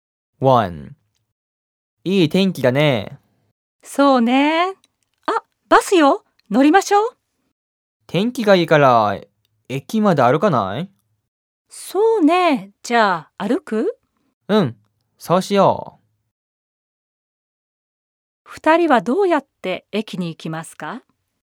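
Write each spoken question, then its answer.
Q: 二人はどうやって駅に行きますか?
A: バスに乗らないで、歩いて行きます。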